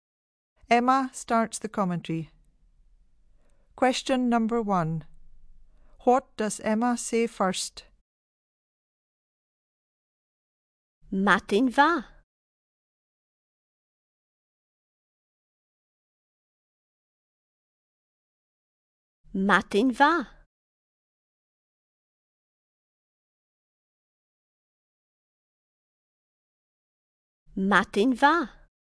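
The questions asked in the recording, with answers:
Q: What does Emma say first?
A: Good morning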